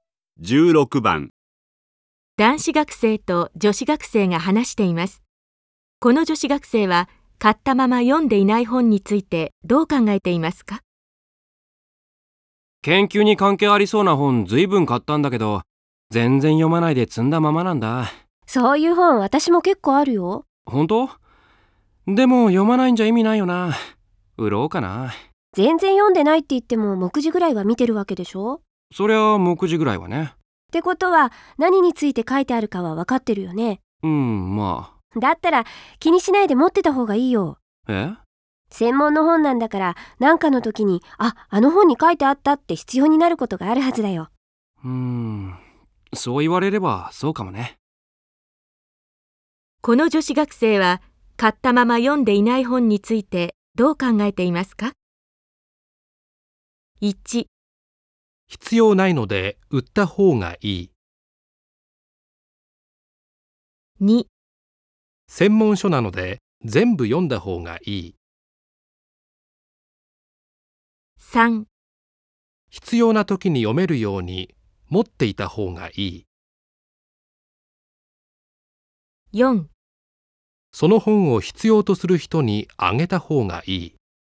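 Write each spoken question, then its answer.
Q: この女子学生は買ったまま読んでいない本についてどう考えていますか?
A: 3: 必要な時に読めるように持っていた方がいい。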